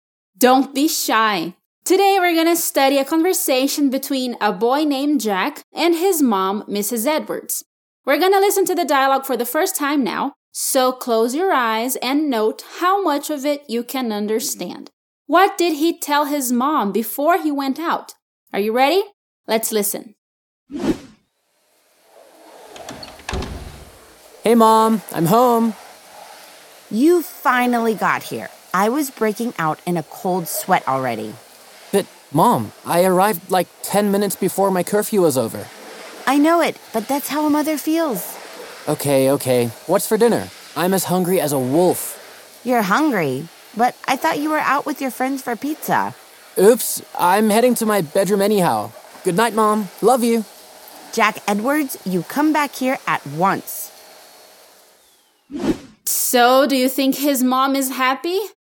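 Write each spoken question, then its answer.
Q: What did he tell his mom before he went out?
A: That he was going out with his friends for pizza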